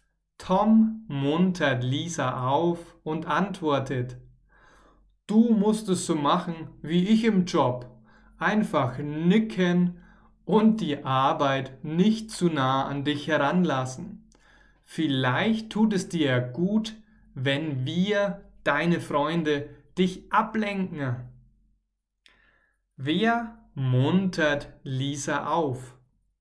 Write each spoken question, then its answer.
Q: Wer muntert Lisa auf?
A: Tom. Tom muntert Lisa auf.